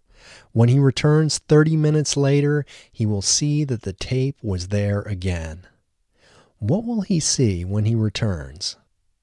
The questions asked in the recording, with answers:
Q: What will he see when he returns?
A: When he returns, he will see that the tape is there again.